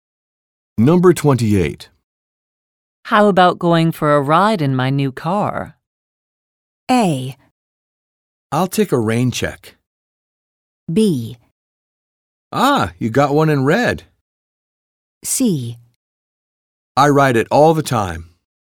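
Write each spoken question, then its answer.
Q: How about going for a ride in my new car?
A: A: I'll take a rain check.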